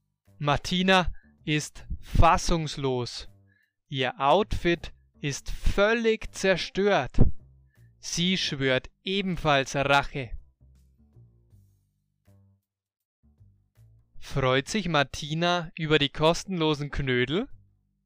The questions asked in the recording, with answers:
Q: Freut sich Martina über die kostenlosen Knödel?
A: Nein, sie freut sich nicht über die kostenlosen Knödel.